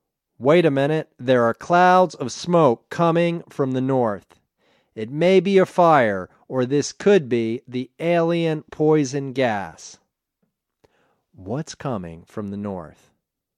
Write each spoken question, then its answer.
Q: What's coming from the north?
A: There are clouds of smoke coming from the north.